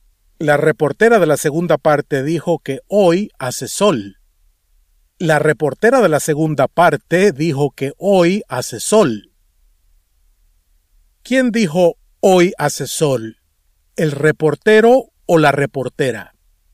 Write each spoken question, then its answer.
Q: ¿Quién dijo hoy hace sol?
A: La reportera.